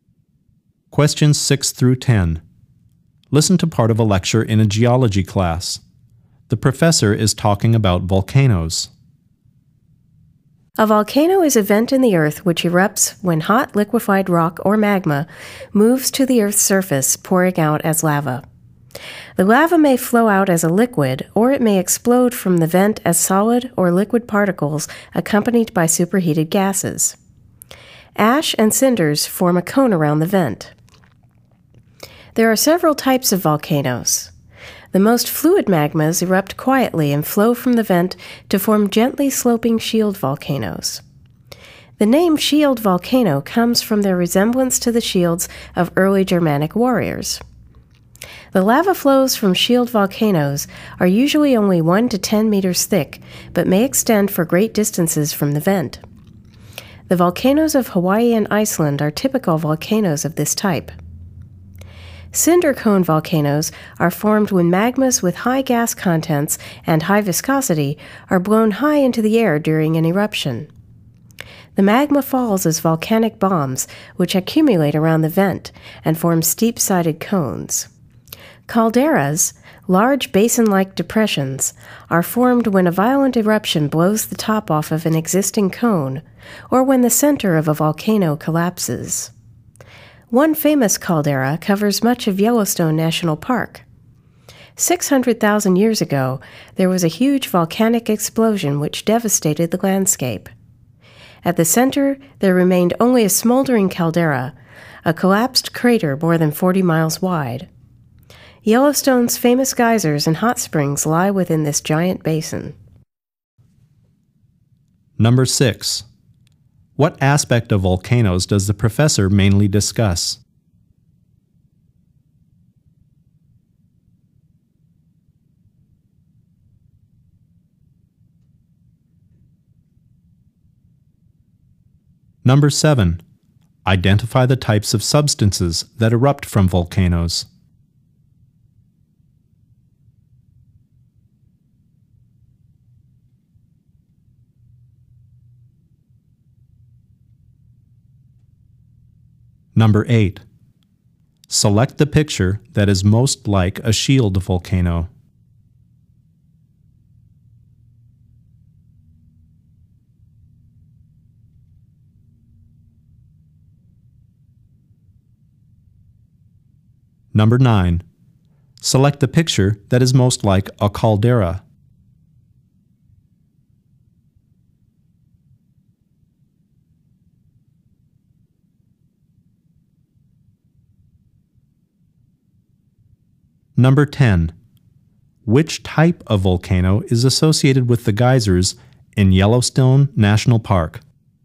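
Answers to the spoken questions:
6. The types of volcanoes
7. Lava, solid or liquid particles, and superheated gases
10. A caldera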